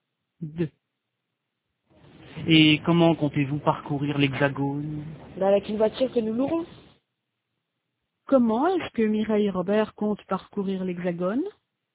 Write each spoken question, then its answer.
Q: Comment est-ce que Mireille et Robert comptent parcourir l'Hexagone?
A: Avec une voiture qu'ils loueront.